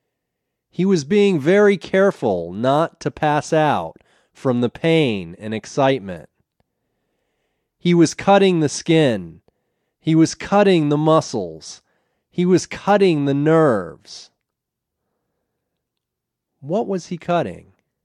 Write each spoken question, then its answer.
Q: What was he cutting?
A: He was cutting the skin, the muscles, and the nerves.